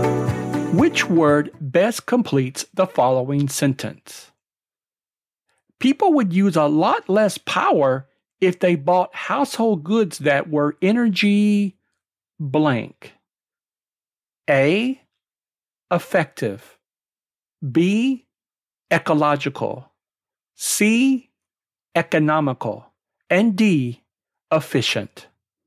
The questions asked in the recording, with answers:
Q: Which word best completes the following sentence?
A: D is the answer, efficient.